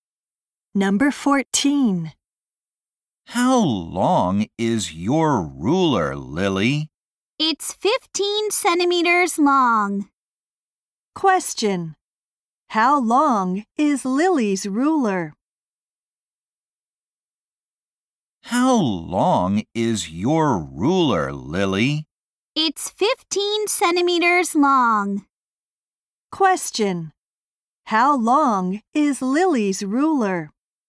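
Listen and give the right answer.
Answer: 15 centimeters long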